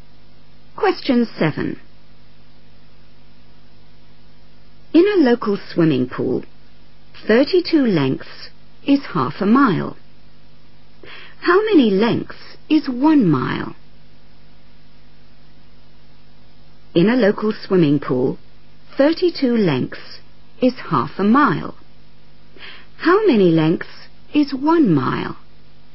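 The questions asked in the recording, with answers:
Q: How many lengths is 1 mile?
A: 64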